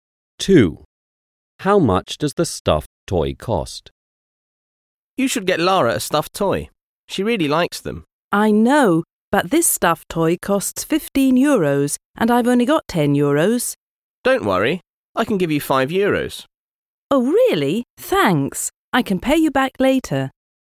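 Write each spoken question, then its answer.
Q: How much does the stuffed toy cost?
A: 15 euros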